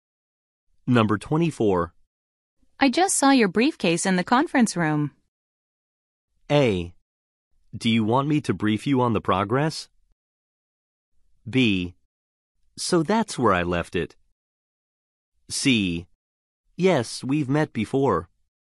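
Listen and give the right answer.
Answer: B: So that's where I left it.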